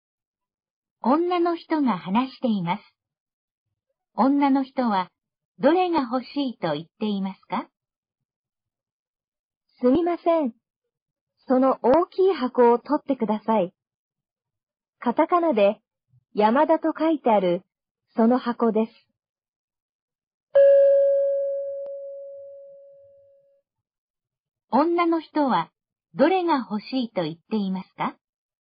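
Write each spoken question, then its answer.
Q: 女の人はどれが欲しいと言っていますか?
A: カタカナで山田と書いてある大きい箱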